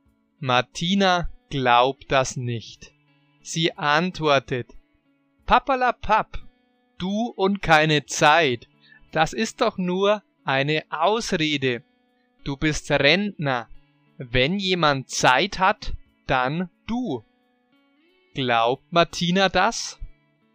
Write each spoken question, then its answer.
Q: Glaubt Martina das?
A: Nein, sie glaubt das nicht.